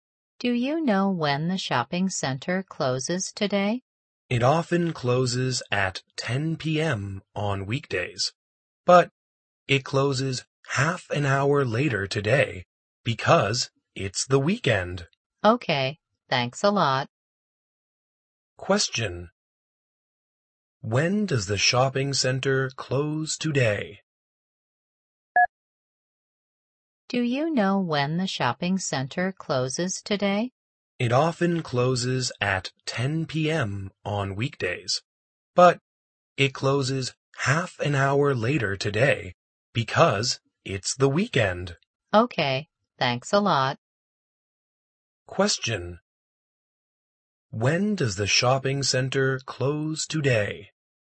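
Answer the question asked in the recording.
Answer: At 10:30 p.m.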